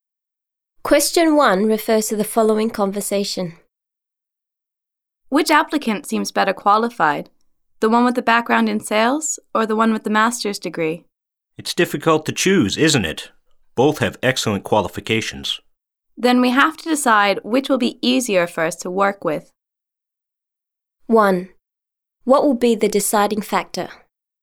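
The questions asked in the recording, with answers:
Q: What will be the deciding factor?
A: Which applicant will be easier for them to work with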